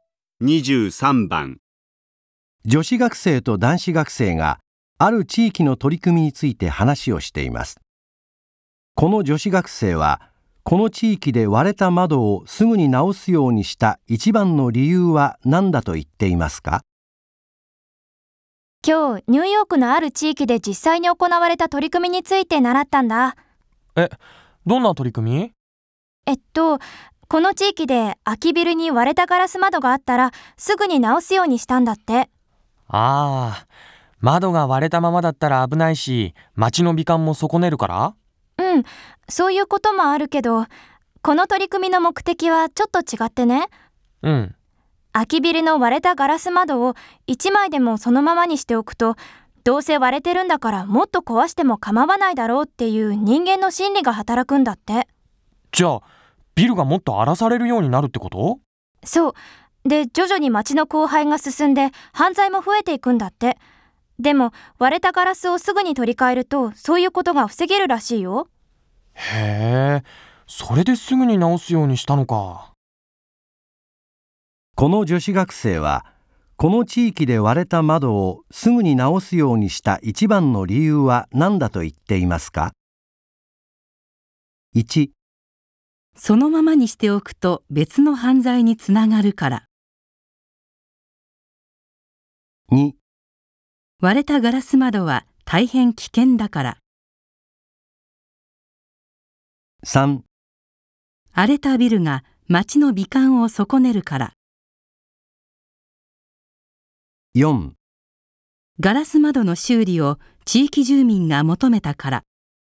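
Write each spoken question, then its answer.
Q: この女子学生はこの地域で割れた窓をすぐに直すようにした一番の理由は何だと言っていますか。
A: 1: そのままにしておくと別の犯罪につながるから。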